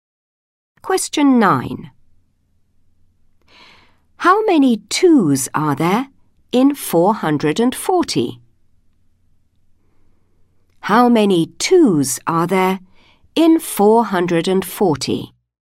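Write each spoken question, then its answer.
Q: How many 2s are there in 440?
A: 220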